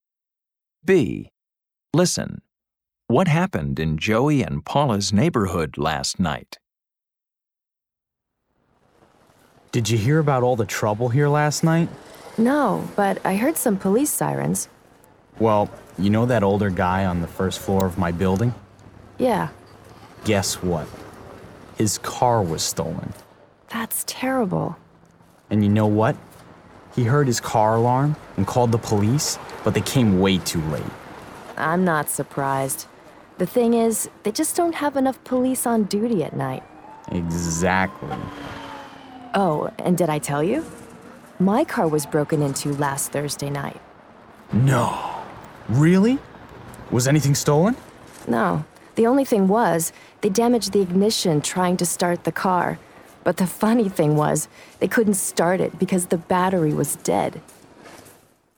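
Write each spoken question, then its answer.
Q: What happened in Joey and Paula's neighborhood last night?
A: A neighbor's car was stolen.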